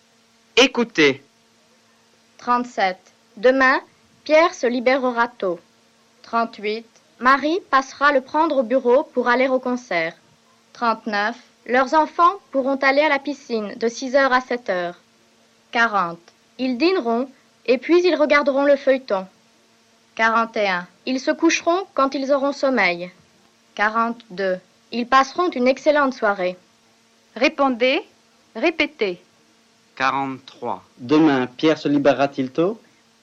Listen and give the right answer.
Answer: Oui, demain, Pierre se libérera tôt.